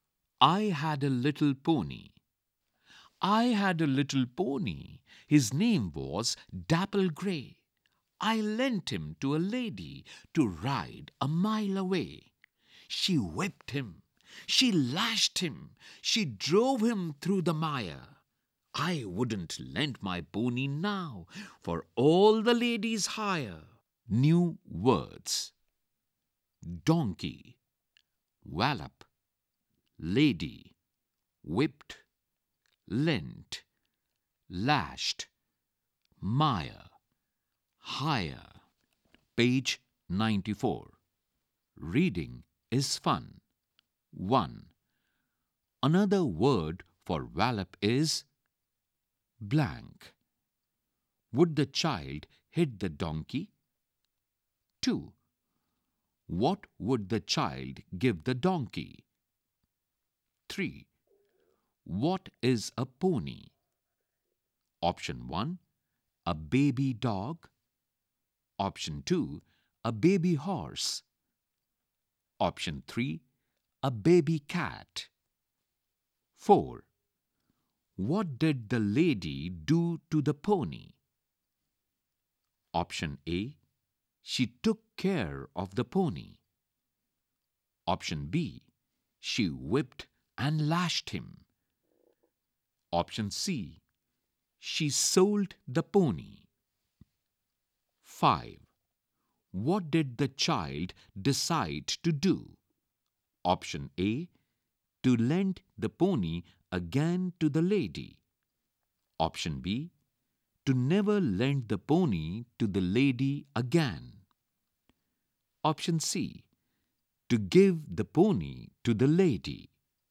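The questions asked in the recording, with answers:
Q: What did the lady do to the pony?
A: B: She whipped and lashed him.

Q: What did the child decide to do?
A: B: To never lend the pony to the lady again.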